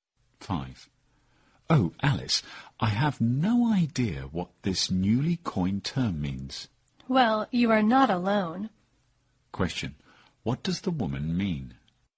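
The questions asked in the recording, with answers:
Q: What does the woman mean?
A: She doesn't know what the term means either.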